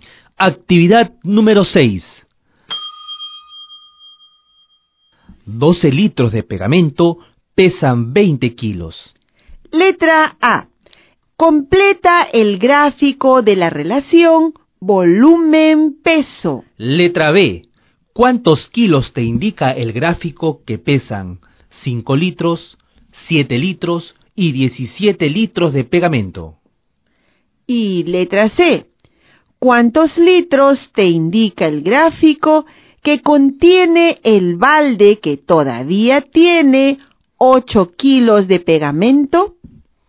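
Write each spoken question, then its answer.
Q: ¿Cuántos kilos te indica el gráfico que pesan 5 litros, 7 litros y 17 litros de pegamento?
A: unos 8,3 kg, 11,7 kg y 28,3 kg

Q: ¿Cuántos litros te indica el gráfico que contiene el balde que todavía tiene 8 kilos de pegamento?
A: 4,8 litros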